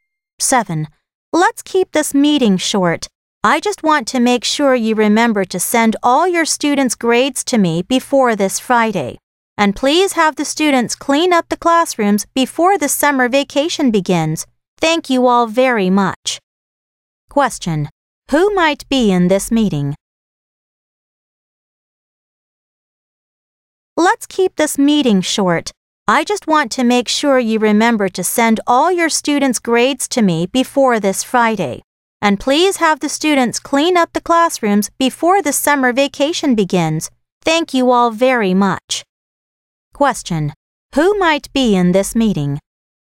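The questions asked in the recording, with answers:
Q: Who might be in this meeting?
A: Teachers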